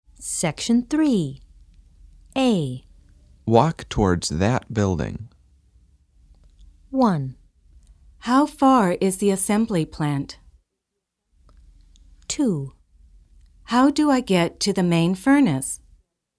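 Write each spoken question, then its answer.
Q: Walk towards that building.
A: 2: How do I get to the main furnace?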